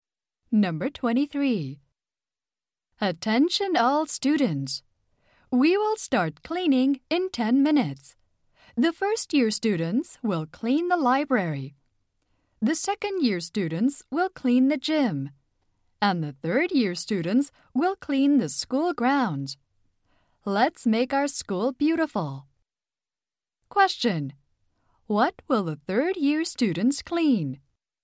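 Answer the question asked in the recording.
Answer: The school grounds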